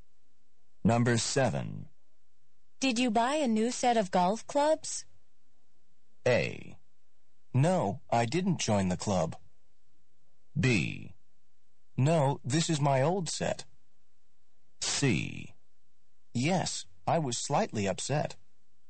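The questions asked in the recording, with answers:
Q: Did you buy a new set of golf clubs?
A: B: No, this is my old set.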